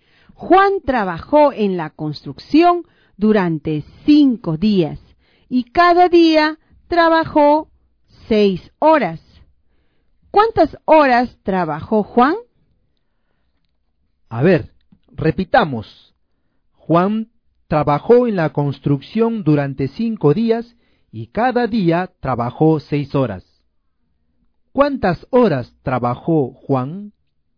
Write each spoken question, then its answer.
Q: ¿Cuántas horas trabajó Juan?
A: 30 horas.